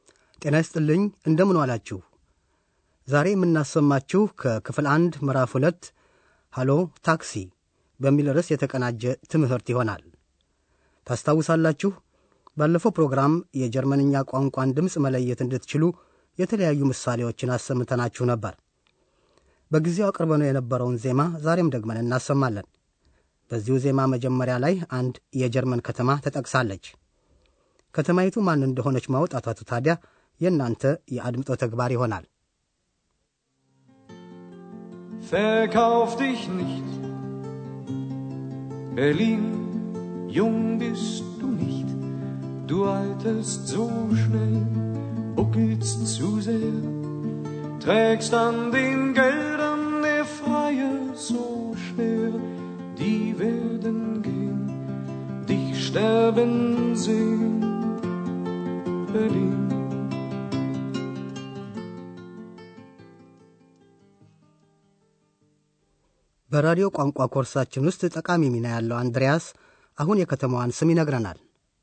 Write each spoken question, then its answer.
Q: በዚሁ ዜማ መጀመሪያ ላይ አንድ የጀርመን ከተማ ተጠቅሳለች ከተማይቱ ማን እንደሆነች ማውጣታቱ ታዲያ የእናንተ የአድምጦ ተግባር ይሆናል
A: በርሊን በርሊን።